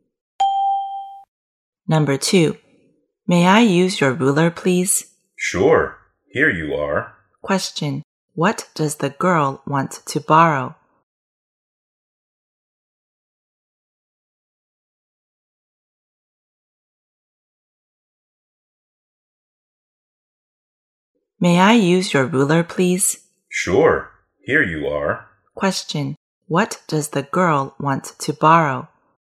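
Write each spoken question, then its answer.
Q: what does the girl want to borrow?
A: A ruler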